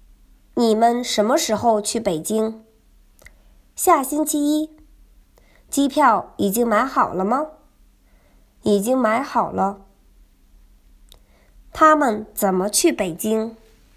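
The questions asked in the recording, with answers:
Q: 他们怎么去北京?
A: 坐飞机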